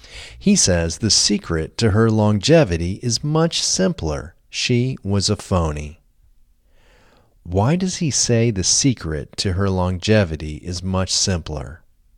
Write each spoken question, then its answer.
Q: Why does he say the secret to her longevity is much simpler?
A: He says the secret to her longevity is much simpler because she was a phony.